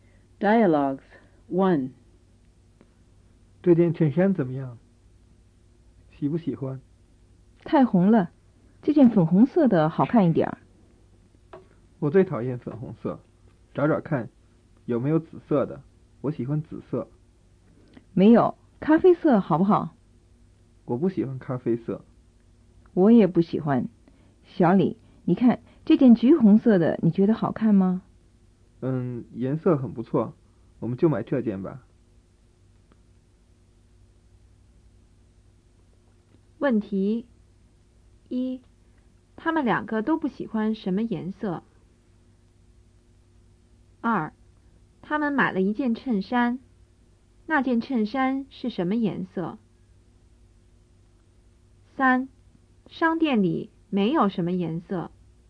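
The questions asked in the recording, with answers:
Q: 他们两个都不喜欢什么颜色?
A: 咖啡色

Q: 他们买了一件衬衫,那件衬衫是什么颜色?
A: 橘红色

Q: 商店里没有什么颜色。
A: 紫色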